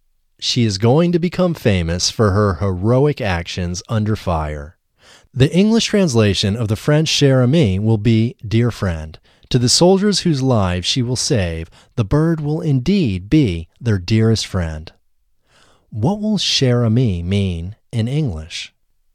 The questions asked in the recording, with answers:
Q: What will Cher Ami mean in English?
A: Cher Ami will mean dear friend in English.